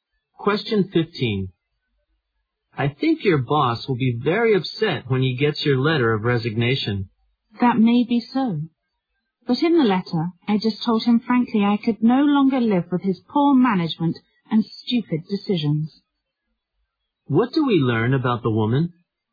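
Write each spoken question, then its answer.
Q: What do we learn about the woman?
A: She has resigned and frankly criticized her boss's management.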